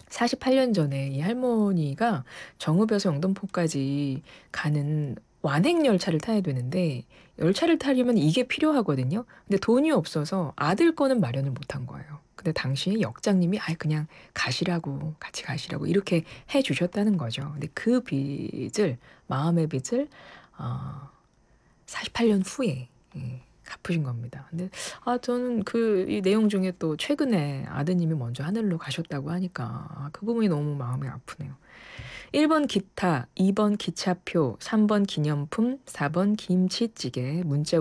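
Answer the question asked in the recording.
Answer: 2: 기차표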